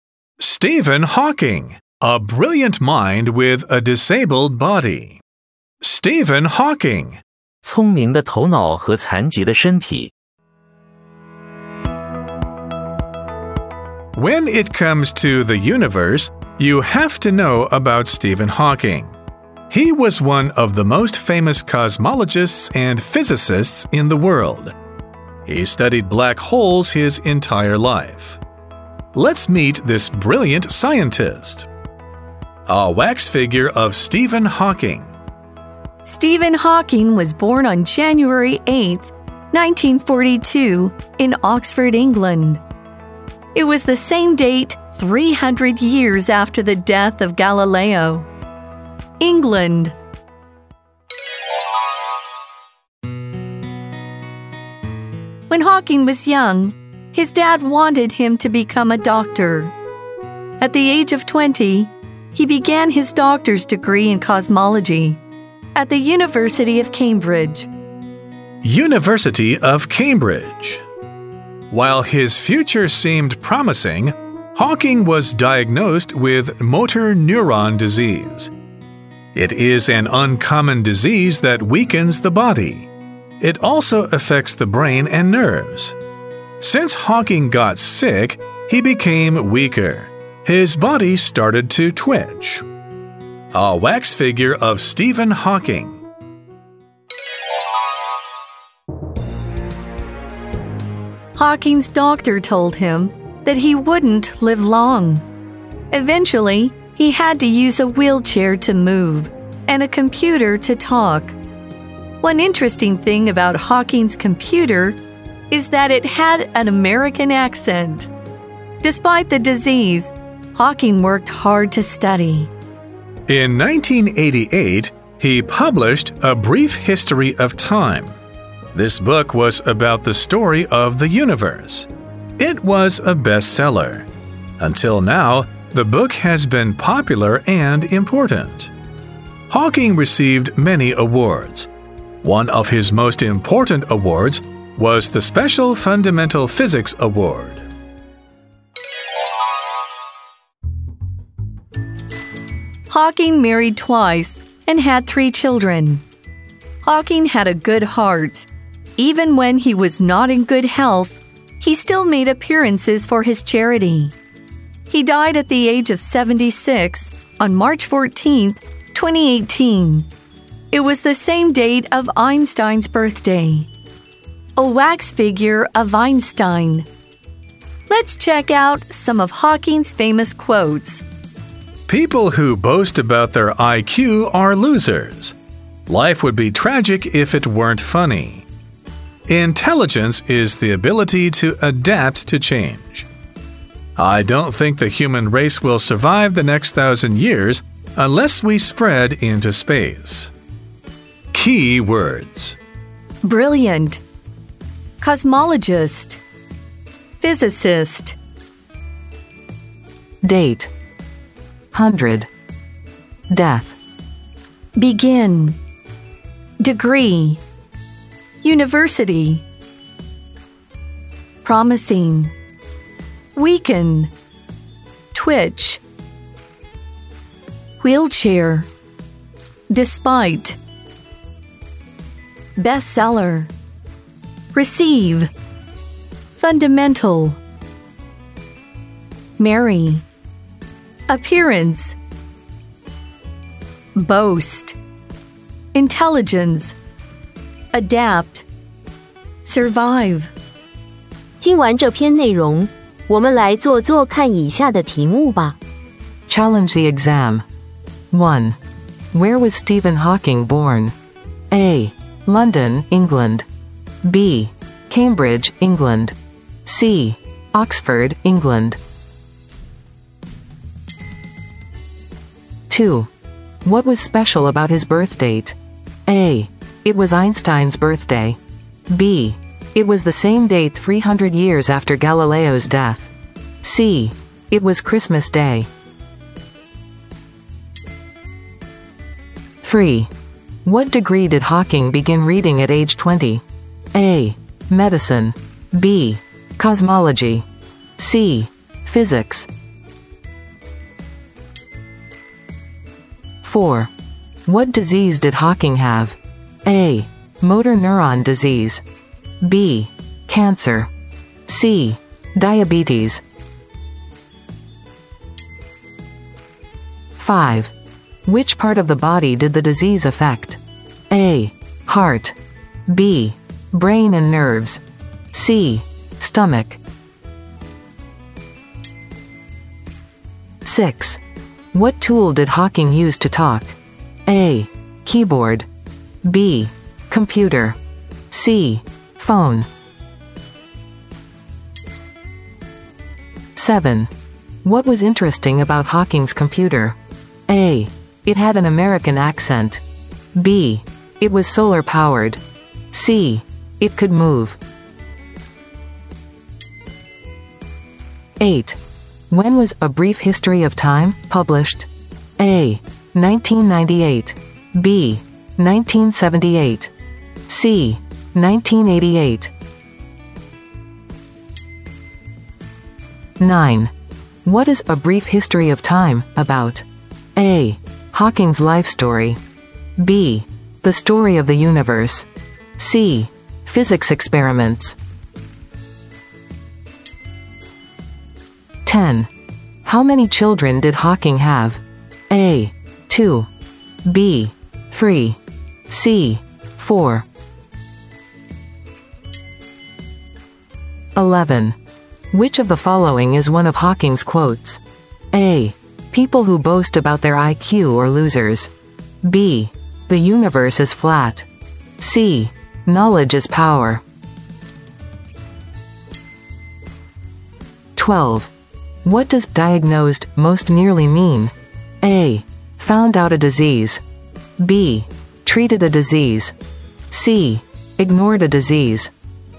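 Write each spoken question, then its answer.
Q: Where was Stephen Hawking born?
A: C: Oxford, England.

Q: What was special about his birth date?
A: B: It was the same day 300 years after Galileo's death.

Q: What degree did Hawking begin reading at age 20?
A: B: Cosmology.

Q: What disease did Hawking have?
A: A: Motor neuron disease.

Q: Which part of the body did the disease affect?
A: B: Brain and nerves.

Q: What tool did Hawking use to talk?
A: B: Computer.

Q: What was interesting about Hawking's computer?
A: A: It had an American accent.

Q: When was A Brief History of Time published?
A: C: 1988.

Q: What is A Brief History of Time about?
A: B: The story of the universe.

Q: How many children did Hawking have?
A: B: 3.

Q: Which of the following is one of Hawking's quotes?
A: A: People who boast about their IQ are losers.

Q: What does diagnosed most nearly mean?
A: A: Found out a disease.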